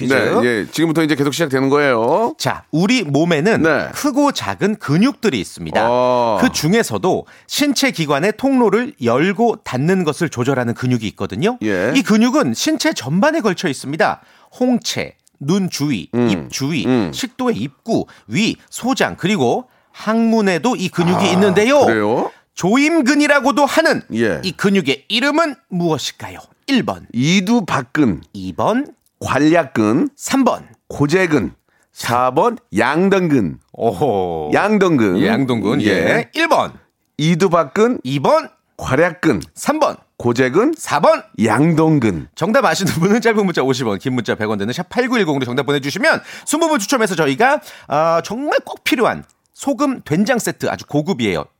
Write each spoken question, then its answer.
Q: 이 근육의 이름은 무엇일까요? 1번. 이두박근. 2번. 관략근. 3번. 고재근. 4번 양덩근.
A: 괄약근이었습니다. 예, 예, 2번이었죠.